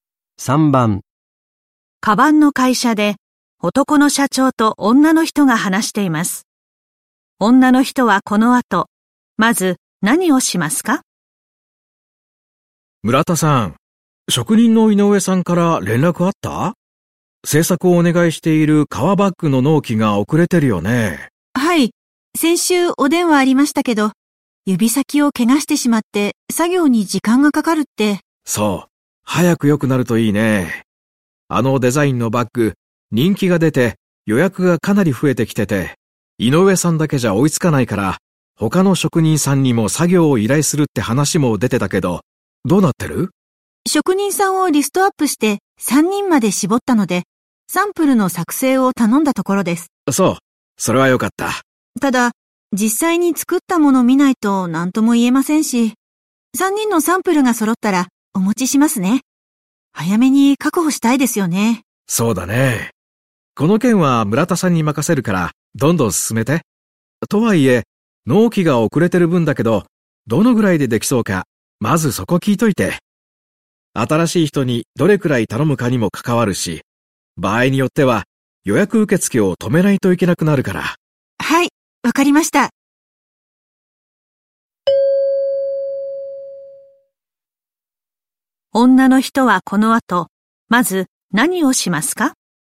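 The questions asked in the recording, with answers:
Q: 女の人はこの後まず何をしますか?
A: 井上さんに、遅れているバッグがどのぐらいでできそうか聞く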